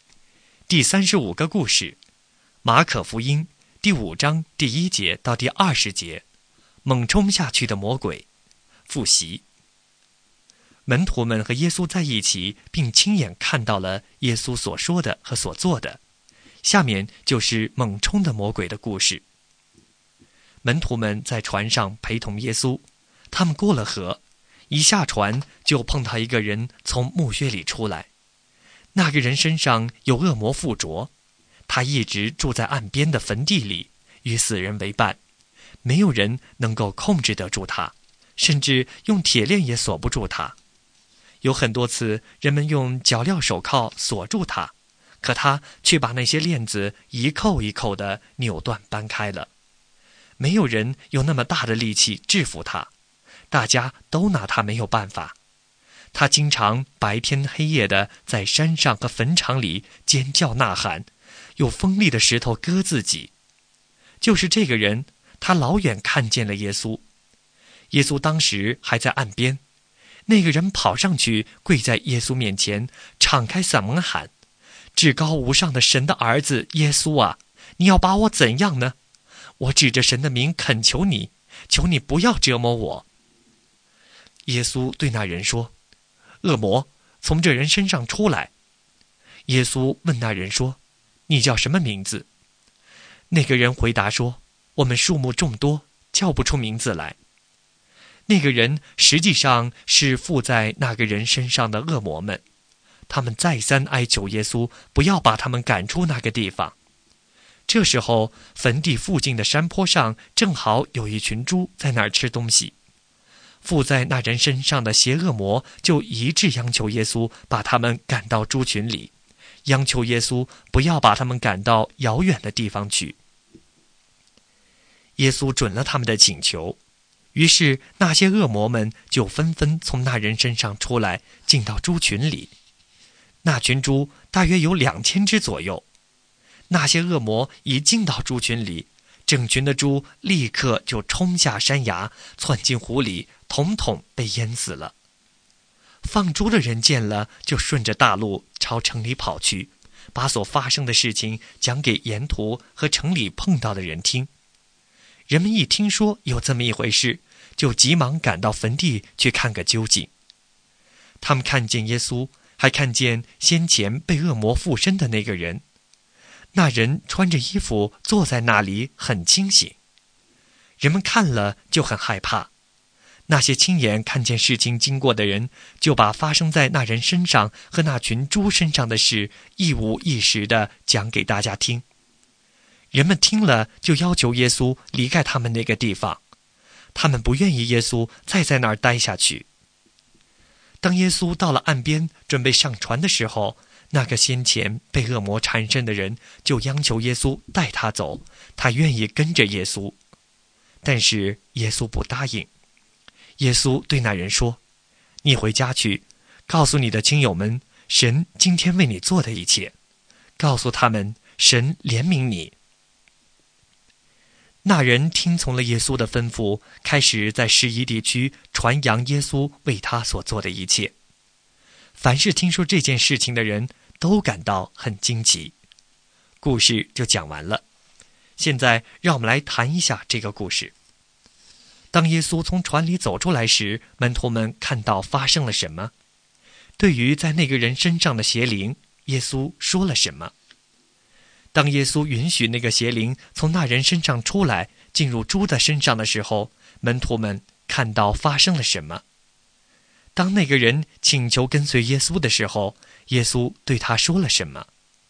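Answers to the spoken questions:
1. 一个被恶魔附身的人从墓穴里出来,跑上去跪在耶稣面前
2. 恶魔,从这人身上出来
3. 大约2000只猪冲下山崖,窜进湖里淹死了
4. 回家去,告诉亲友们神为你做的一切,告诉他们神怜悯你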